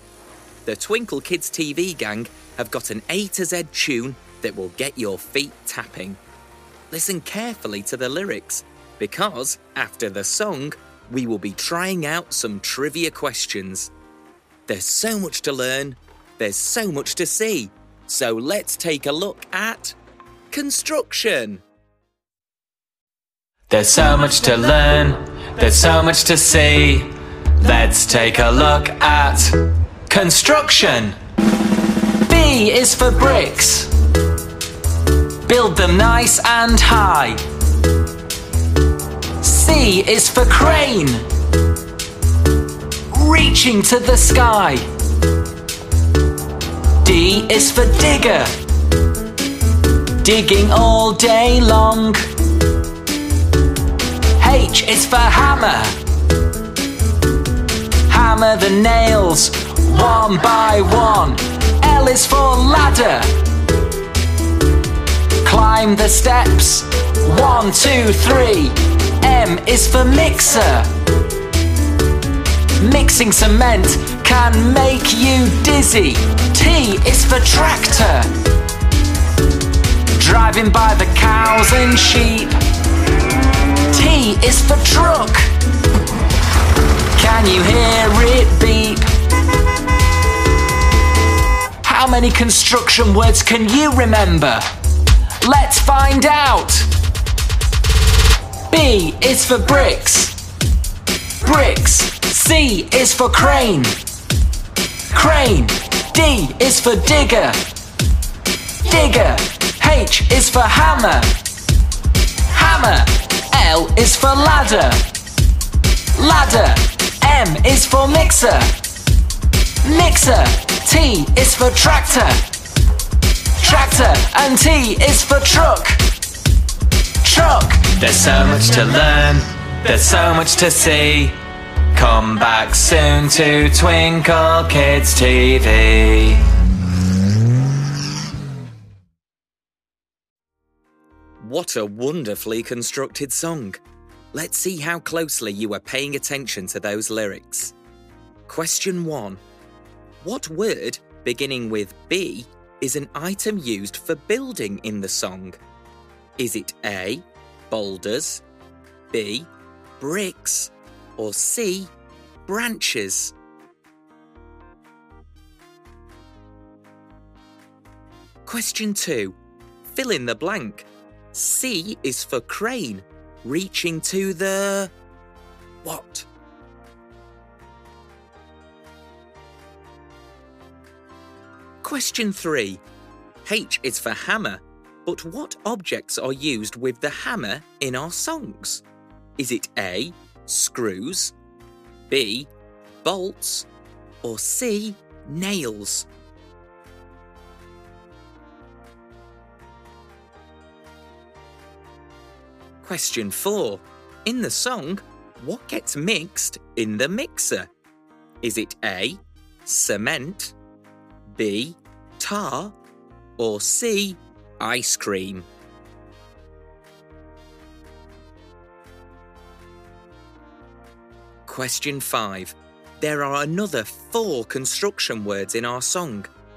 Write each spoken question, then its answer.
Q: What word, beginning with B, is an item used for building in the song?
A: The answer is B, bricks.

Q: C is for crane, reaching to the...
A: C is for crane reaching to the sky.

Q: H is for hammer, but what objects are used with the hammer in our songs?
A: So the answer is C.

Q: In the song, what gets mixed in the mixer?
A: In our song, the answer is A, cement.